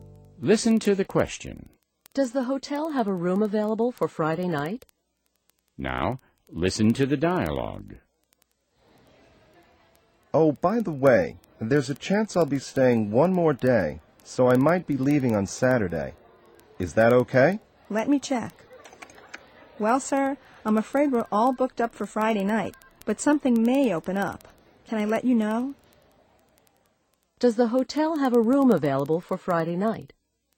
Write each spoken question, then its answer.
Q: Does the hotel have a room available for Friday night?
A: No, the hotel is fully booked on Friday night.